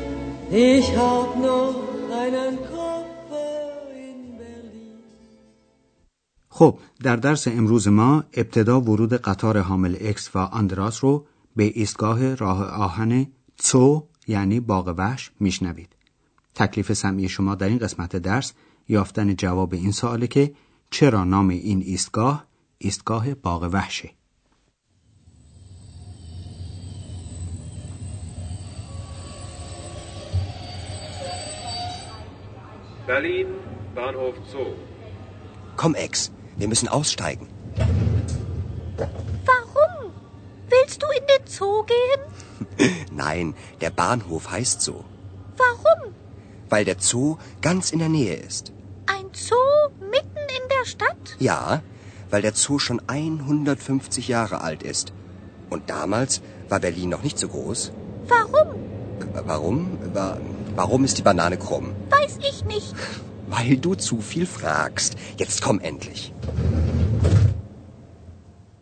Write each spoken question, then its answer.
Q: چرا نام این ایستگاه ایستگاه باغ وحشه؟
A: پس فهمیدیم که علت این نامگذاری اینه که این ایستگاه در مجاورت باغ وحش برلن